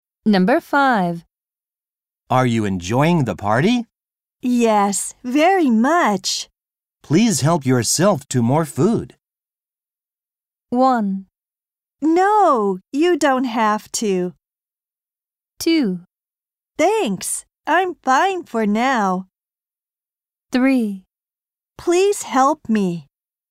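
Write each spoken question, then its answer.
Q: Please help yourself to more food.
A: 2: Thanks, I'm fine for now.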